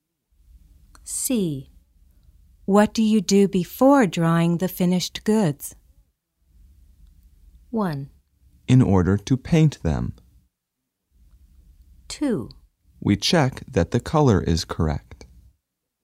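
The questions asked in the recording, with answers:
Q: What do you do before drying the finished goods?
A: 2: We check that the color is correct.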